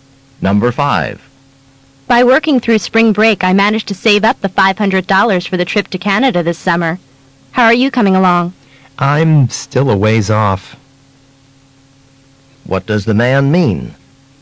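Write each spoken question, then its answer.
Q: What does the man mean?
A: He hasn't saved enough money yet.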